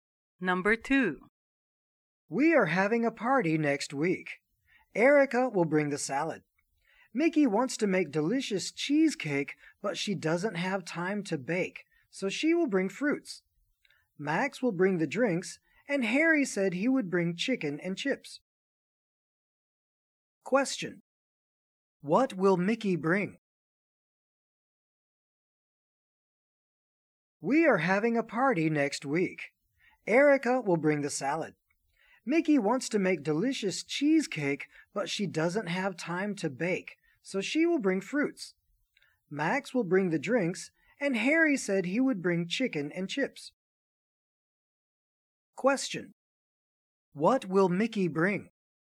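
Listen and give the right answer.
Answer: Fruits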